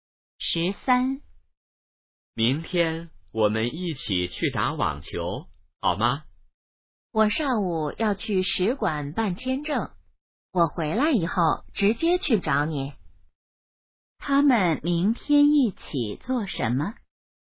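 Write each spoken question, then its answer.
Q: 他们明天一起做什么?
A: 打网球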